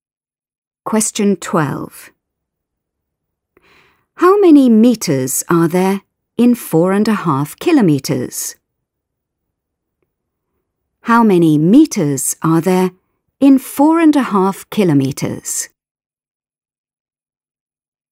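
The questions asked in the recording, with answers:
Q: How many meters are there in 4.5 kilometres?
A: 4500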